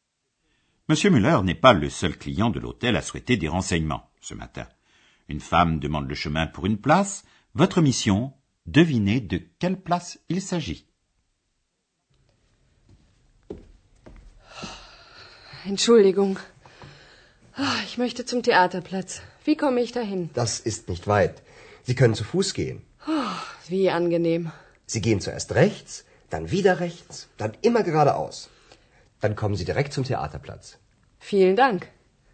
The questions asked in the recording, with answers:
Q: Votre mission, devinez de quelle place il s'agit.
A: La place que la femme cherche est la place du théâtre.